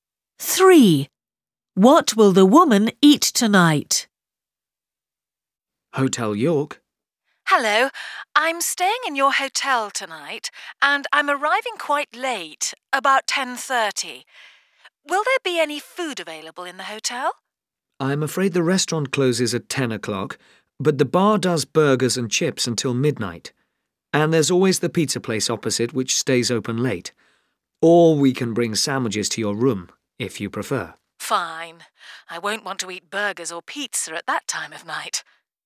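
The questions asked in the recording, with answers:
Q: Three. What will the woman eat tonight?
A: sandwiches in her room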